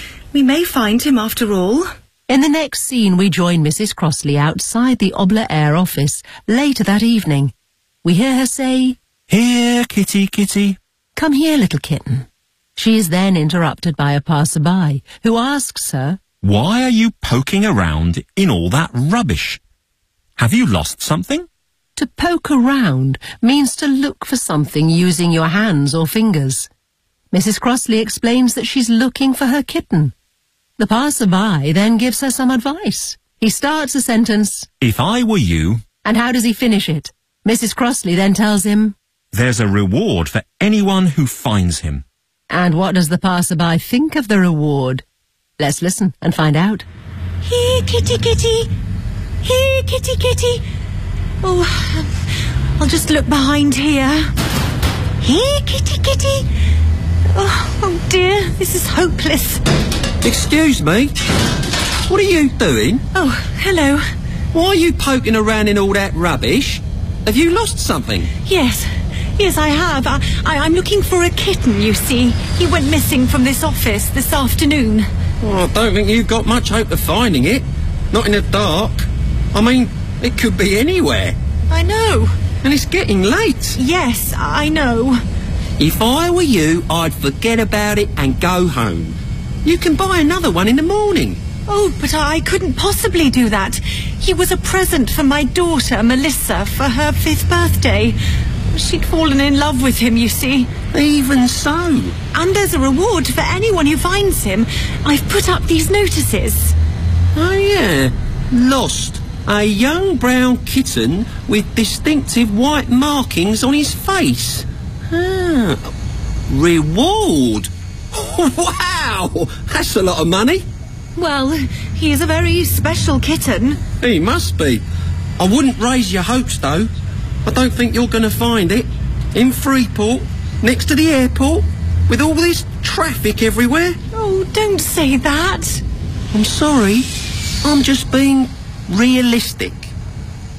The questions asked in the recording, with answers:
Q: And how does he finish it?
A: If I were you, I'd forget about it and go home.

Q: And what does the passerby think of the reward?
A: Wow, That's a lot of money.